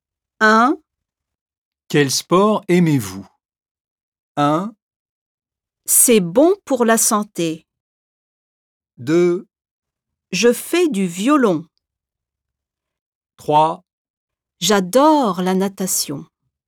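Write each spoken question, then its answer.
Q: Quel sport aimez-vous?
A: 3: J'adore la natation.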